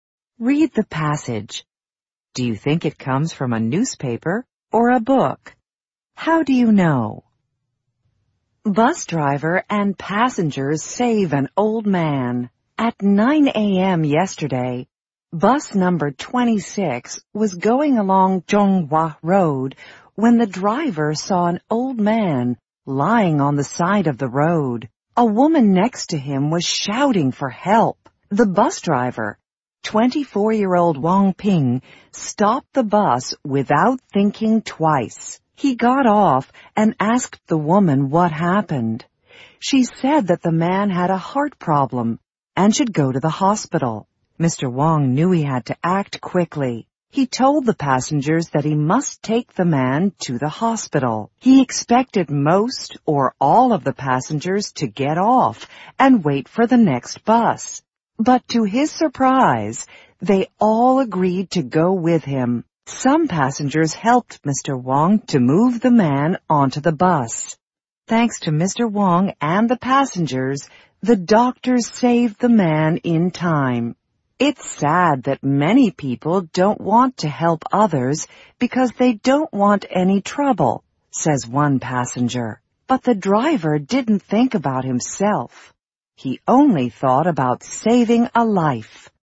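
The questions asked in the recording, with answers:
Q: Do you think it comes from a newspaper or a book?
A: A newspaper: it has a headline and reports a recent event ("yesterday") with quotes.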